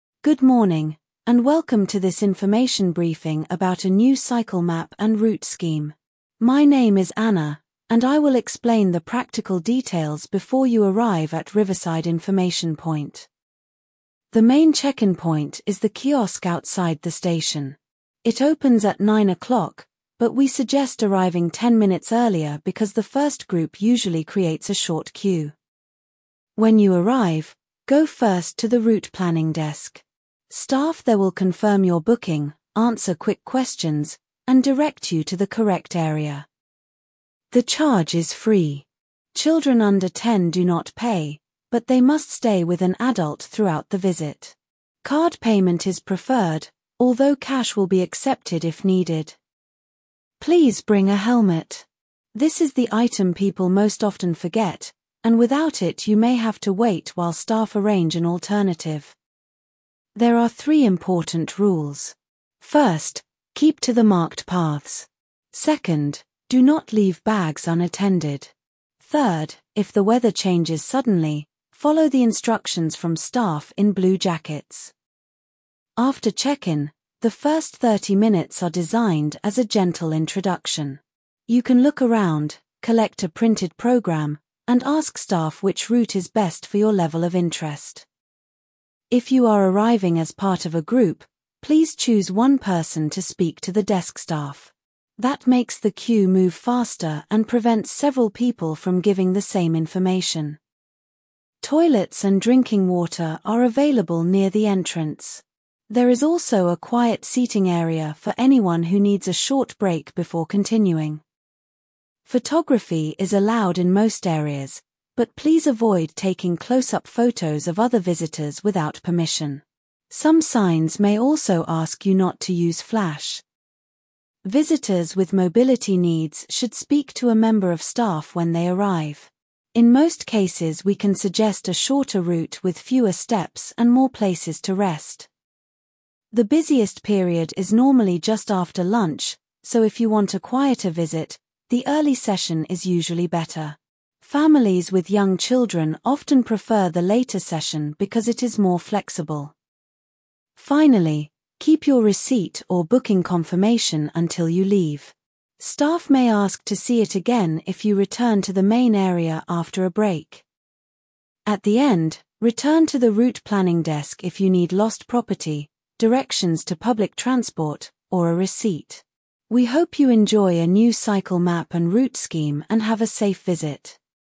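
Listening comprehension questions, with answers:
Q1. What is the talk mainly about?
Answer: A new cycle map and route scheme

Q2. Where is the main check-in point?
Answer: The kiosk outside the station

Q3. What time does check-in open?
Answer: Nine o'clock

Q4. Where should visitors go first?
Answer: Route planning desk

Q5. How much is the charge?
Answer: Free

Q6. What should visitors bring?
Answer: A helmet

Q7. Who gives instructions if the weather changes?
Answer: Staff in blue jackets

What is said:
Good morning, and welcome to this information briefing about a new cycle map and route scheme. My name is Anna, and I will explain the practical details before you arrive at Riverside Information Point.
The main check-in point is the kiosk outside the station. It opens at nine o'clock, but we suggest arriving ten minutes earlier because the first group usually creates a short queue.
When you arrive, go first to the route planning desk. 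Staff there will confirm your booking, answer quick questions, and direct you to the correct area.
The charge is free. Children under ten do not pay, but they must stay with an adult throughout the visit. Card payment is preferred, although cash will be accepted if needed.
Please bring a helmet. This is the item people most often forget, and without it you may have to wait while staff arrange an alternative.
There are three important rules. First, keep to the marked paths. Second, do not leave bags unattended. Third, if the weather changes suddenly, follow the instructions from staff in blue jackets.
After check-in, the first thirty minutes are designed as a gentle introduction. You can look around, collect a printed programme, and ask staff which route is best for your level of interest.
If you are arriving as part of a group, please choose one person to speak to the desk staff. That makes the queue move faster and prevents several people from giving the same information.
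Toilets and drinking water are available near the entrance. There is also a quiet seating area for anyone who needs a short break before continuing.
Photography is allowed in most areas, but please avoid taking close-up photos of other visitors without permission. Some signs may also ask you not to use flash.
Visitors with mobility needs should speak to a member of staff when they arrive. In most cases we can suggest a shorter route with fewer steps and more places to rest.
The busiest period is normally just after lunch, so if you want a quieter visit, the early session is usually better. Families with young children often prefer the later session because it is more flexible.
Finally, keep your receipt or booking confirmation until you leave. Staff may ask to see it again if you return to the main area after a break.
At the end, return to the route planning desk if you need lost property, directions to public transport, or a receipt. 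We hope you enjoy a new cycle map and route scheme and have a safe visit.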